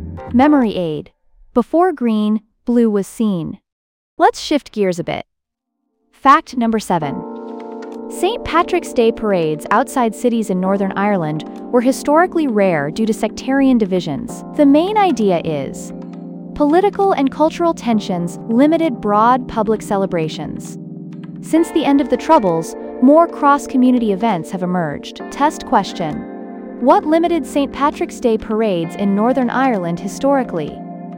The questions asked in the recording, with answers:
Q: What limited St. Patrick's Day parades in Northern Ireland historically?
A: Correct answer. Sectarian divisions.